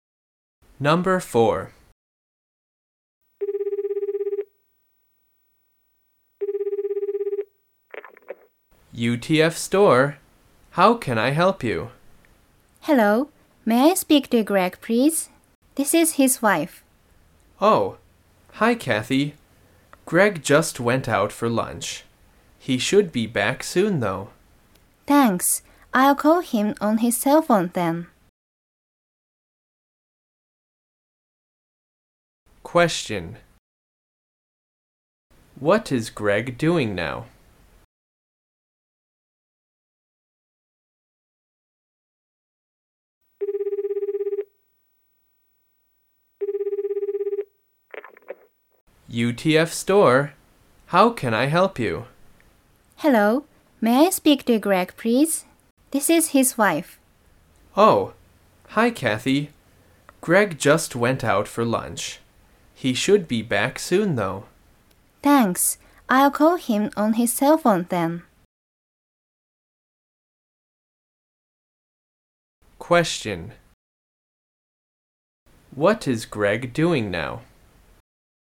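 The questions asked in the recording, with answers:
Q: What is Greg doing now?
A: He is out having lunch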